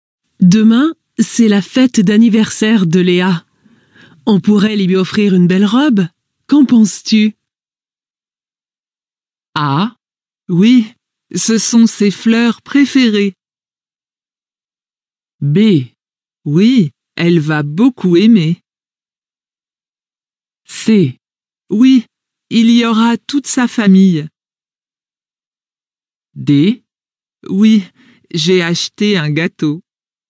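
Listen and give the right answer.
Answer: B: Oui, elle va beaucoup aimer.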